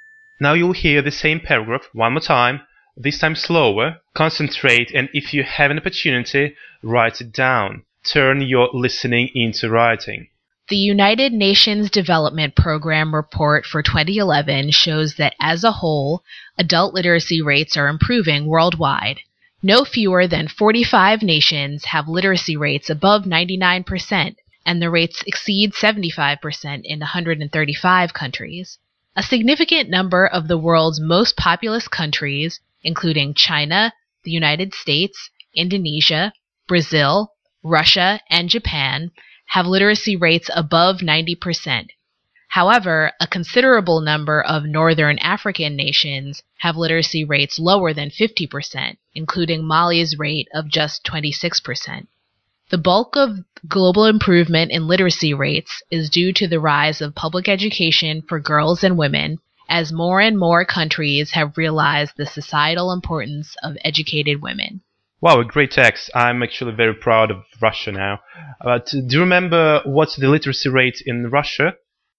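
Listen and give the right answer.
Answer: above 90%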